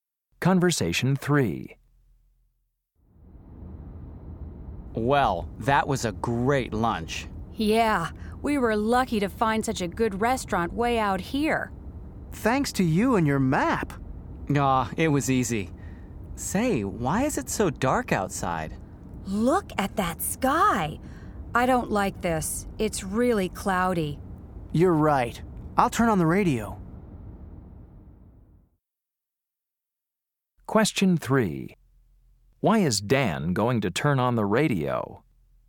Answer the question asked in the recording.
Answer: Yes, see if you can find a weather report.